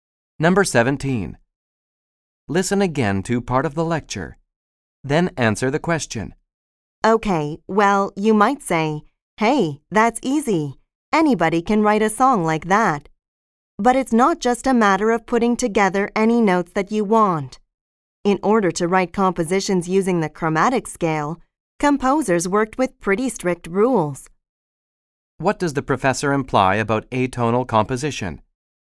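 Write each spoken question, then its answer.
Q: What does the professor imply about atonal composition?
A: It is not easy; composers had to follow strict rules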